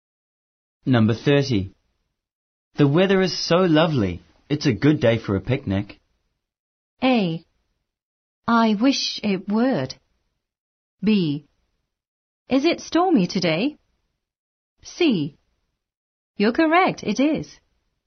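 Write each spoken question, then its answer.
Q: The weather is so lovely.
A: C: You're correct, it is.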